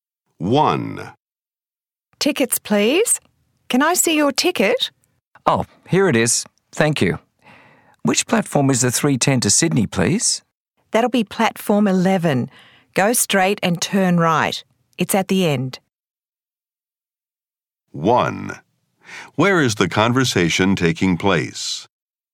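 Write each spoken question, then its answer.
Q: Where is the conversation taking place?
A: At a train station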